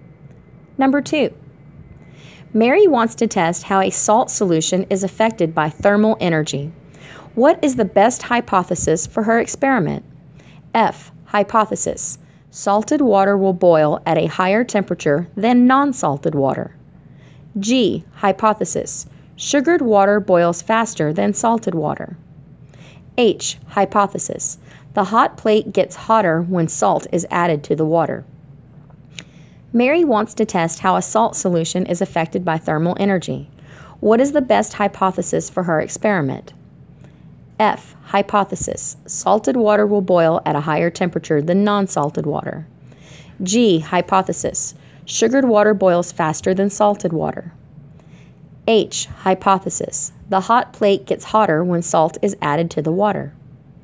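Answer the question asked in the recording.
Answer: F: Hypothesis. Salted water will boil at a higher temperature than non-salted water.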